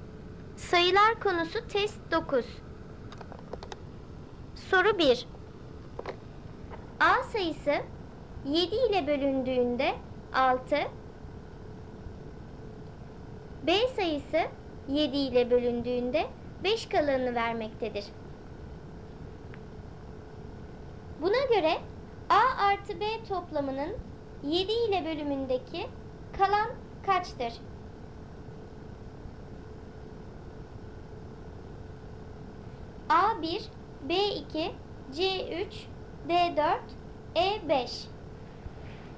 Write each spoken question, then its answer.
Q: Buna göre A artı B toplamının 7 ile bölümündeki kalan kaçtır?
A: Doğru cevap D4.